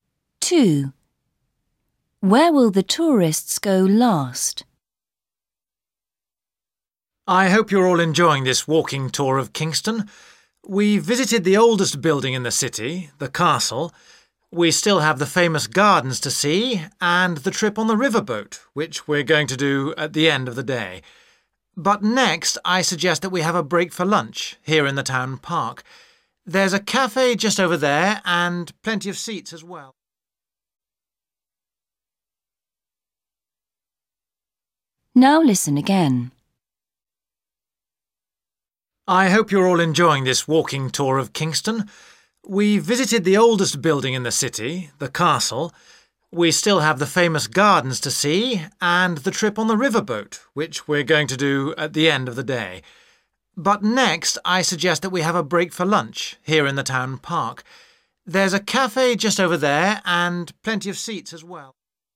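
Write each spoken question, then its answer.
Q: Where will the tourists go last?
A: On the riverboat trip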